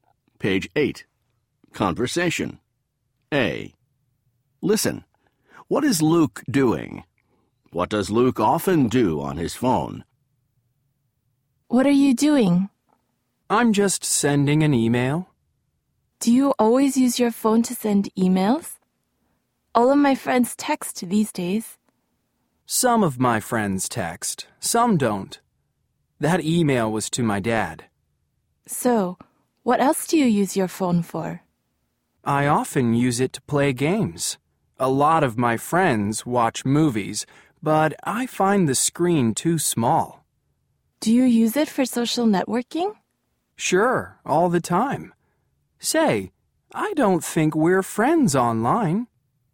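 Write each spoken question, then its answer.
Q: What is Luke doing?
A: Sending an email

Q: What does Luke often do on his phone?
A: Plays games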